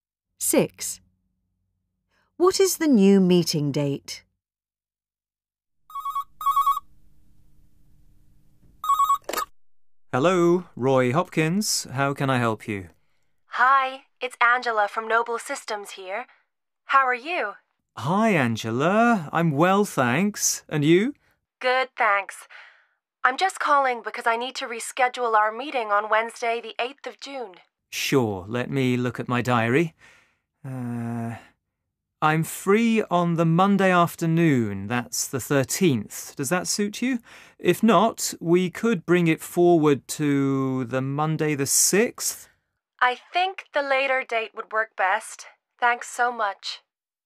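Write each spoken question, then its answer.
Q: What is the new meeting date?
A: Monday the 13th of June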